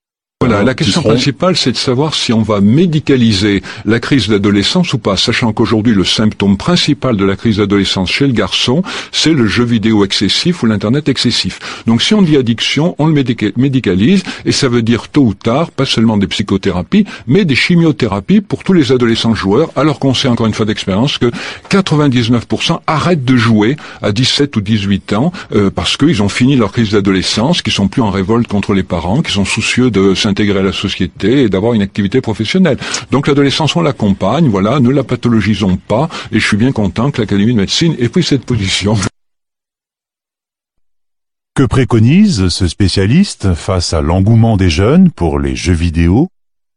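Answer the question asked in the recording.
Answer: Accompagner l'adolescence sans la médicaliser ni la pathologiser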